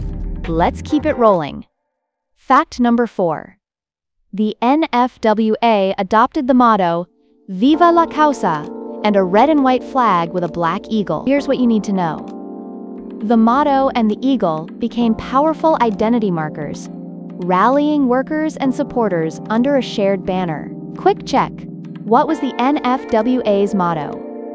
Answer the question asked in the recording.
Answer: Viva la Causa.